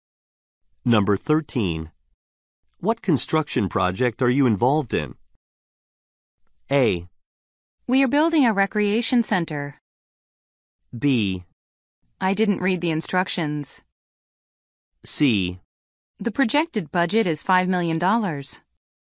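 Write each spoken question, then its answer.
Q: What construction project are you involved in?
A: A: We are building a recreation center.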